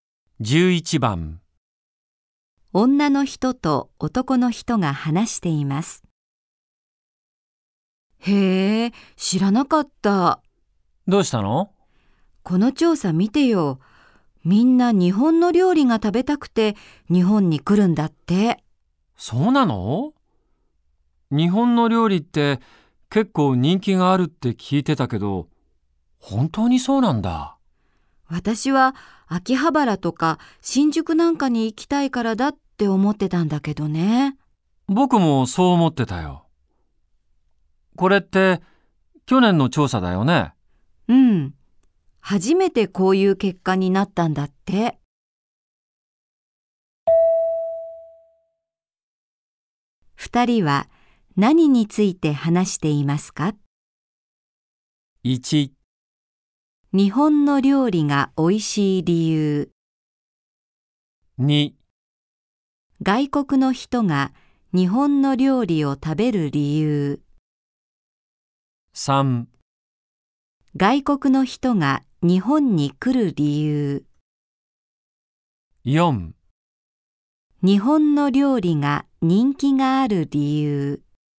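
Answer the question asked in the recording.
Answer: 3: 外国の人が日本に来る理由。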